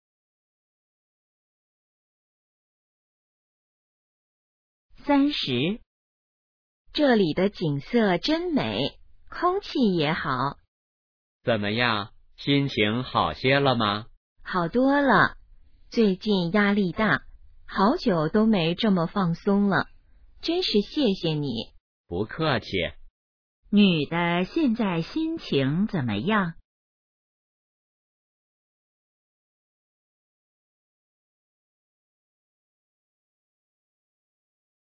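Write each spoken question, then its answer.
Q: 女的现在心情怎么样?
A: 好多了,很放松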